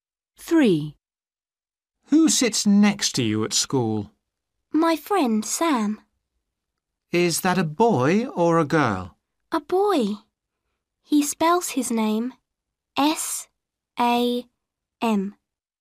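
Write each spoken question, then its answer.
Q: Who sits next to you at school?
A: Sam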